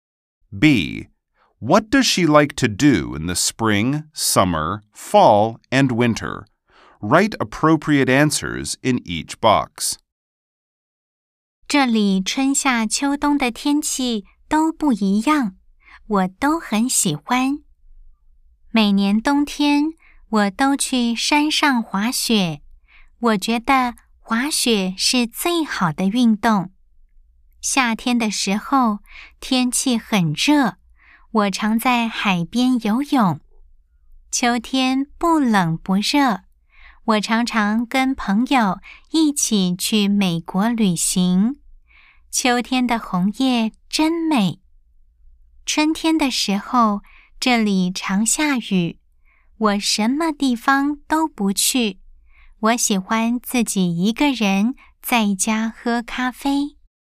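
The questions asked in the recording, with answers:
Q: What does she like to do in the spring, summer, fall, and winter?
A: Spring: drink coffee alone at home; summer: swim at the beach; fall: travel with friends; winter: go skiing in the mountains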